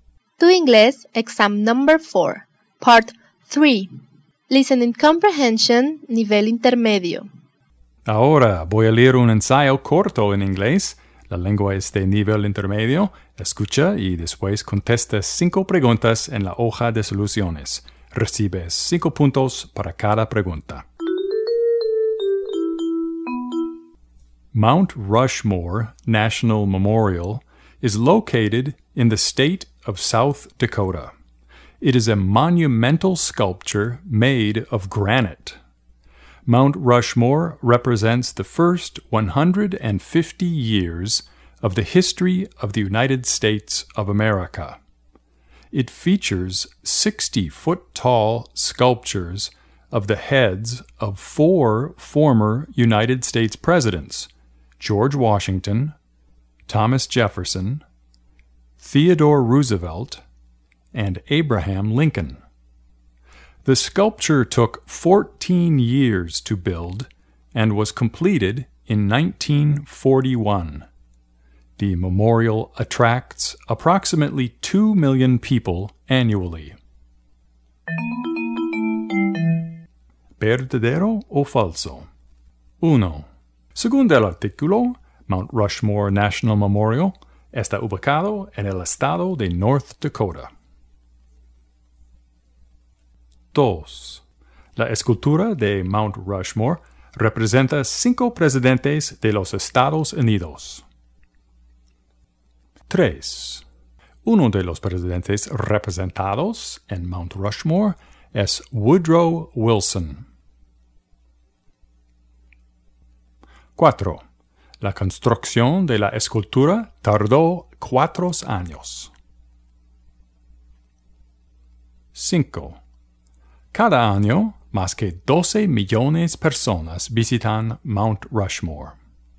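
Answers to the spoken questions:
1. Falso
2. Falso
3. Falso
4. Falso
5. Falso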